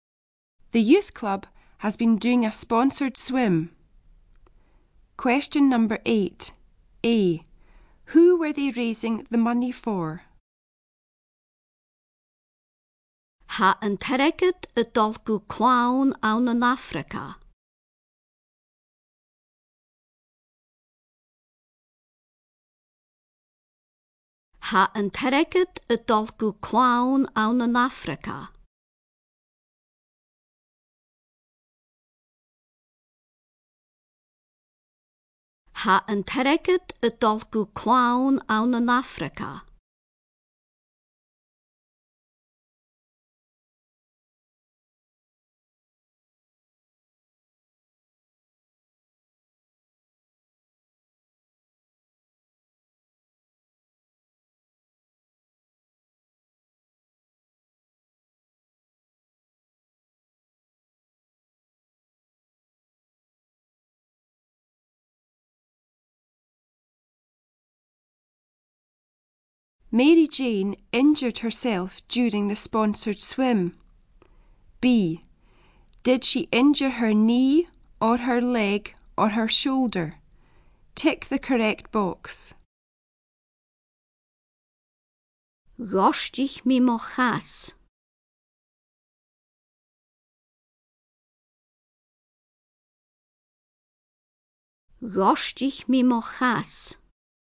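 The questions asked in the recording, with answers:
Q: Did she injure her knee or her leg or her shoulder?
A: Her leg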